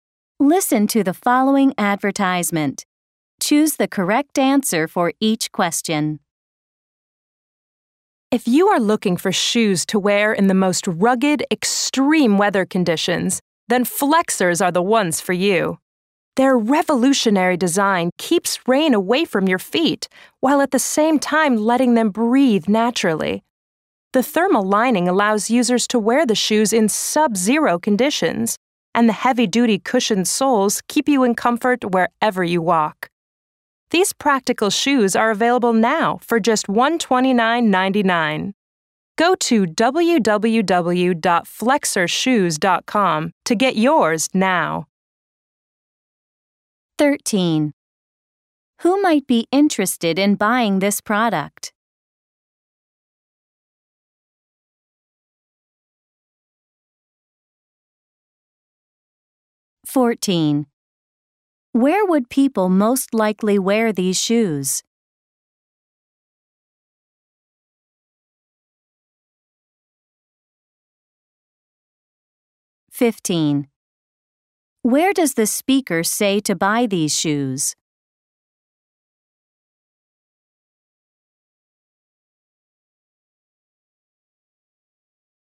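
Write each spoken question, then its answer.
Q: Where does the speaker say to buy these shoes?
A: Online at www.flexershoes.com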